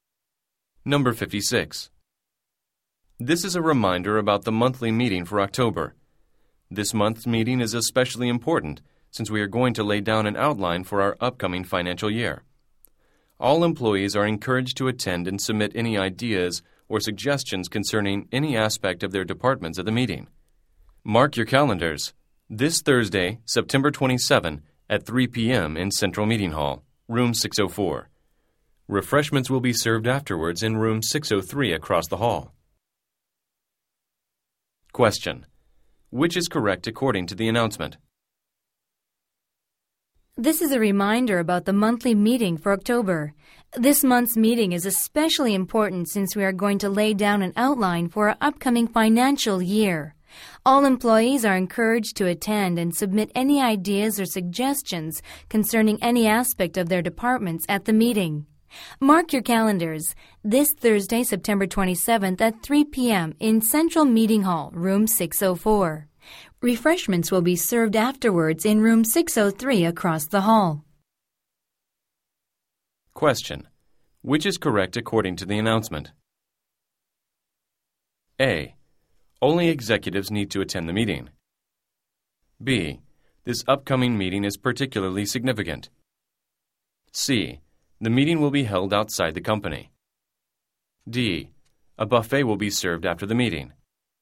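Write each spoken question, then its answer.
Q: Which is correct according to the announcement?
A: B: This upcoming meeting is particularly significant.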